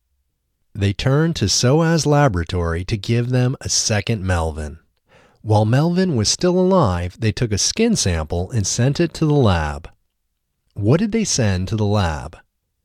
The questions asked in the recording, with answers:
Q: What did they send to the lab?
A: They sent a skin sample to the lab.